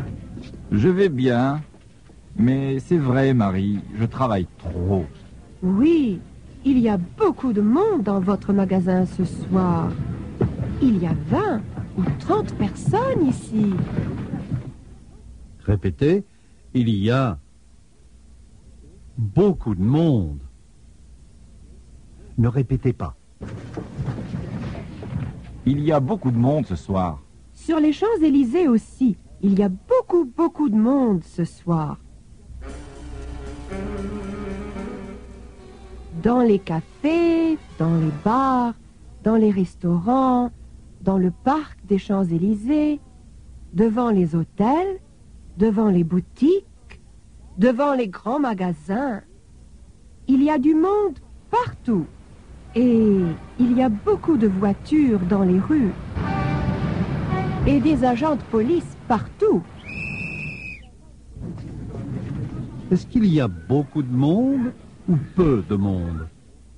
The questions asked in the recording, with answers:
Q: Est-ce qu'il y a beaucoup de monde ou peu de monde?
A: Il y a beaucoup de monde.